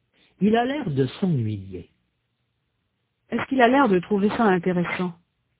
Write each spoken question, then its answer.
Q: Est-ce qu'il a l'air de trouver ça intéressant?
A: Non, il a l'air de s'ennuyer.